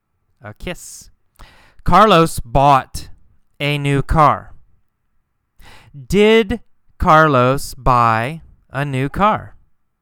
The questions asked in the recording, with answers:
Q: Did Carlos buy a new car?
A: Yes. Yes, of course. He bought a new car.